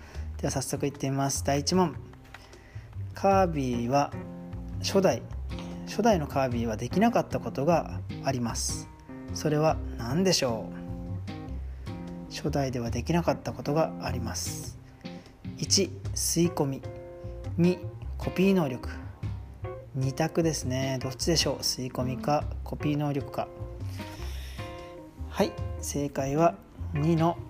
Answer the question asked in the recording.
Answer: 正解は2の